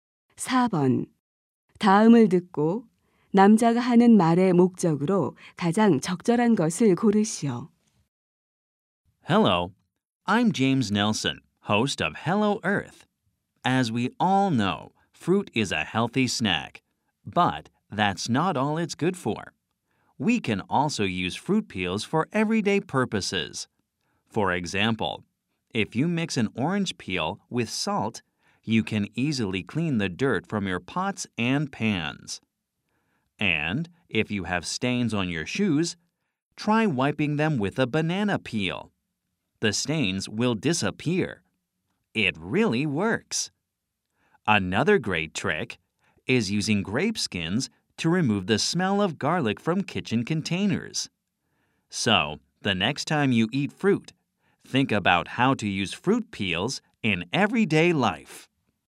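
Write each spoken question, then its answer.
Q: 다음을 듣고 남자가 하는 말의 목적으로 가장 적절한 것을 고르시오.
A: 과일 껍질을 일상생활에 활용하는 방법을 소개하려고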